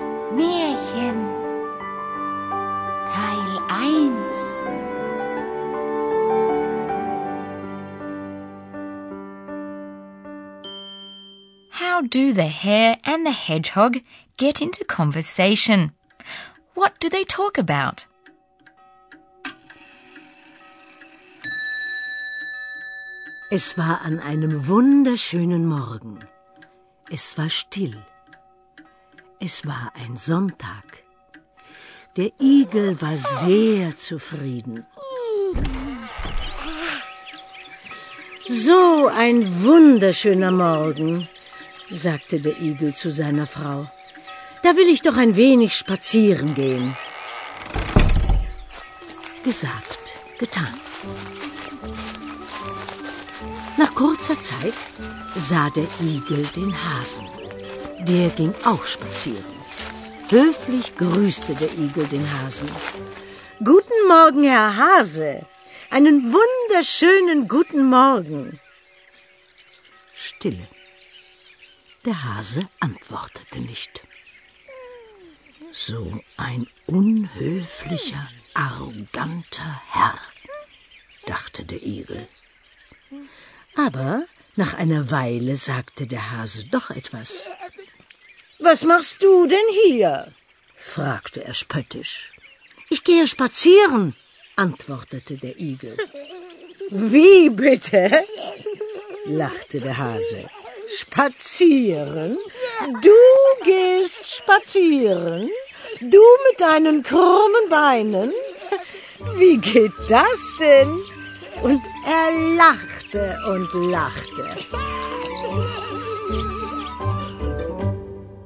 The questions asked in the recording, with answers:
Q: How do the hare and the hedgehog get into conversation?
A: The hare, probably the hedgehog's neighbor, had the same idea.

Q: What do they talk about?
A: Going for a walk. Spazieren gehen.